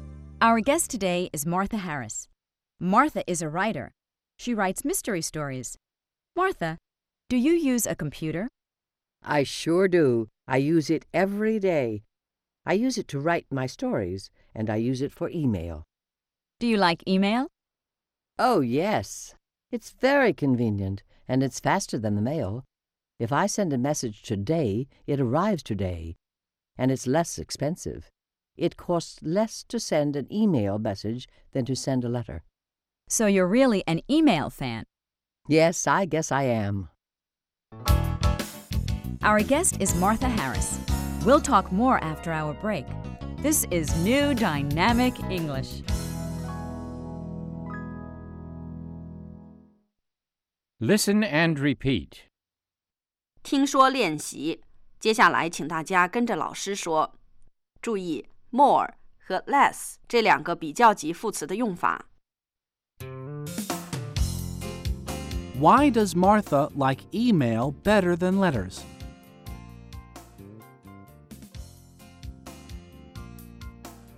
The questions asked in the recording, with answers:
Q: Why does Martha like email better than letters?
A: It's faster.